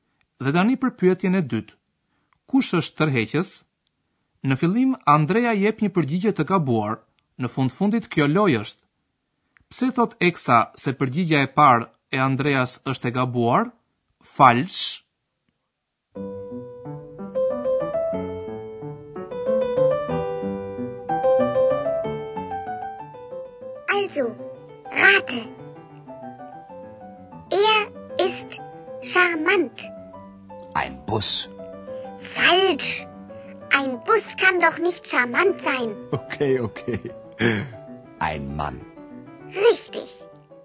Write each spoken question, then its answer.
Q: Pse thot Eksa se përgjigja e parë e Andreas është e gabuar?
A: Një autobus nuk mund të jetë tërheqës, thot ajo.